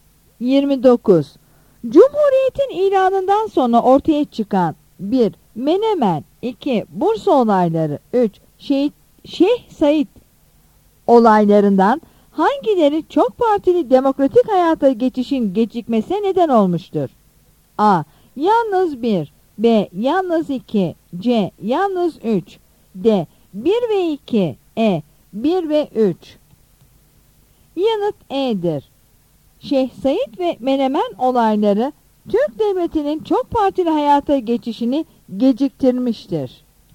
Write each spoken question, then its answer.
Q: Şeyh Said olaylarından hangileri çok partili demokratik hayata geçişin gecikmesine neden olmuştur?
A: Yanıt E'dir.